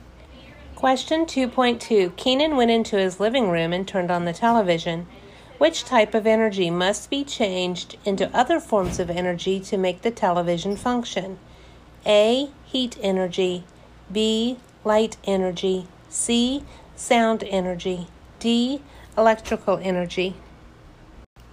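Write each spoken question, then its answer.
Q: Which type of energy must be changed into other forms of energy to make the television function?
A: D: electrical energy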